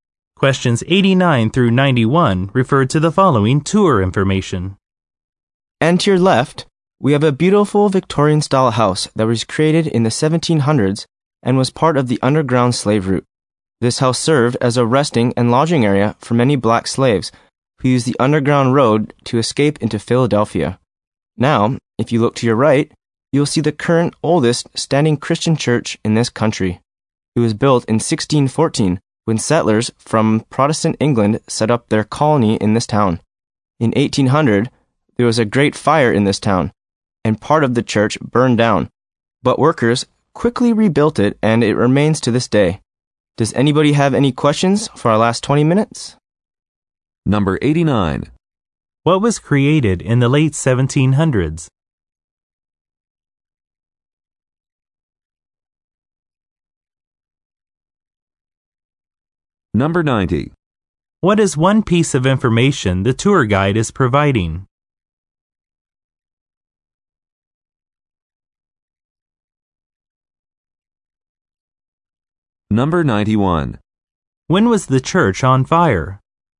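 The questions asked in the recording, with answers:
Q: What was created in the late 1700s?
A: A Victorian-style house

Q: When was the church on fire?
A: In 1800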